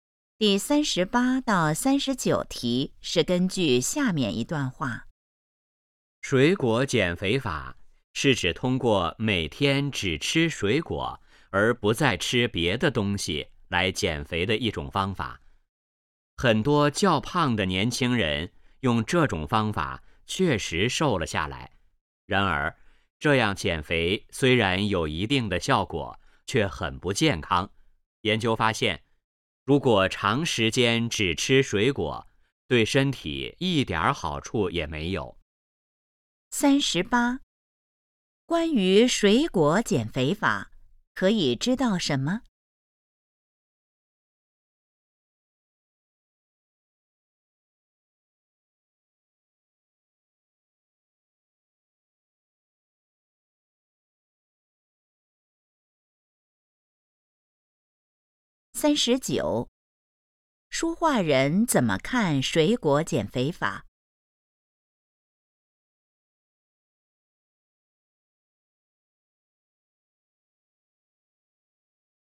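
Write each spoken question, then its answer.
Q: 书画人怎么看水果减肥法?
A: 不健康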